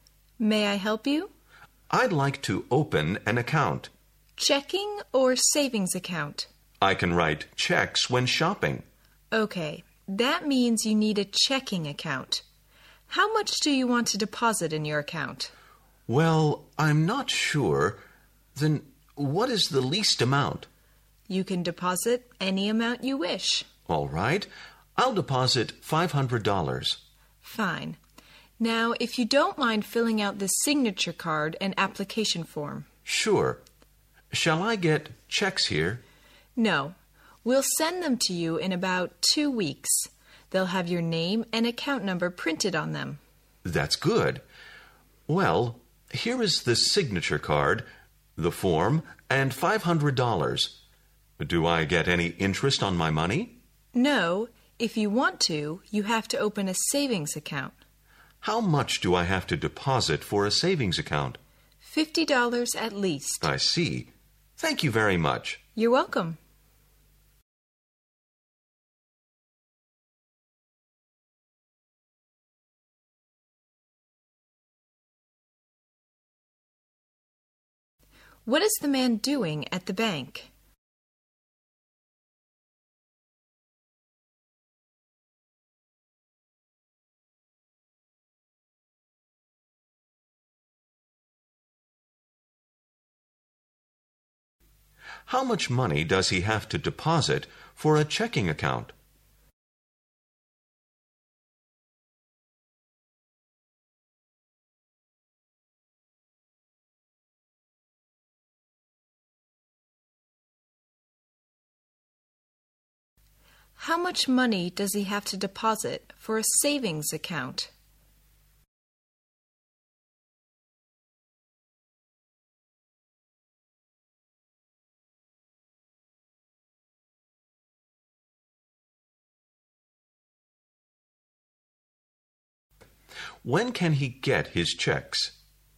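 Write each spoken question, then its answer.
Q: What is the man doing at the bank?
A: Opening a checking account

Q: How much money does he have to deposit for a checking account?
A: Any amount he wishes

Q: How much money does he have to deposit for a savings account?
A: At least $50

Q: When can he get his checks?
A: In about 2 weeks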